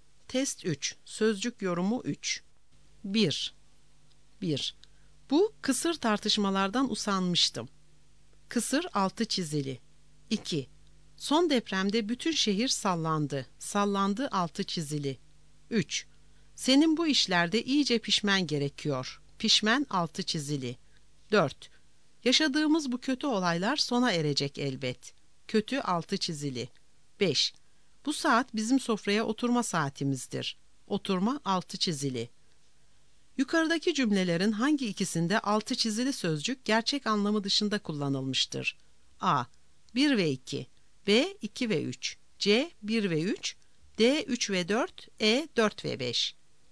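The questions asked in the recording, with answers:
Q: Yukarıdaki cümlelerin hangi ikisinde altı çizili sözcük gerçek anlamı dışında kullanılmıştır?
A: C: 1 ve 3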